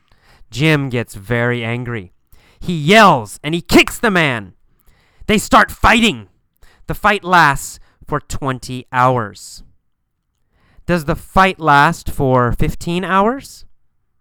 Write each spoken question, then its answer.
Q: Does the fight last for 15 hours?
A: No, it does not last for 15 hours.